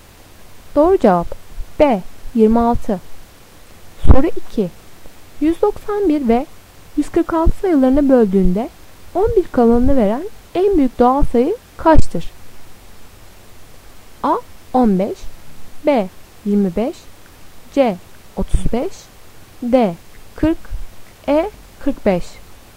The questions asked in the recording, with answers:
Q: 191 ve 146 sayılarını böldüğünde 11 kalanını veren en büyük doğal sayı kaçtır?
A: Doğru cevap E 45.